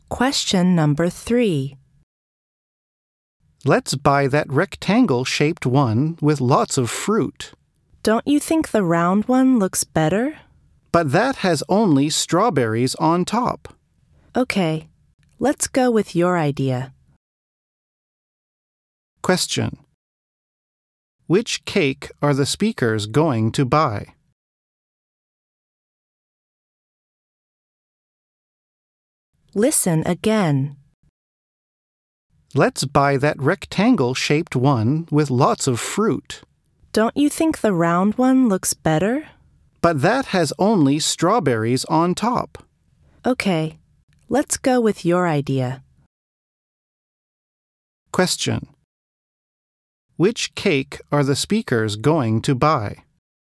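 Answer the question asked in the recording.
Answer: The rectangle-shaped one with lots of fruit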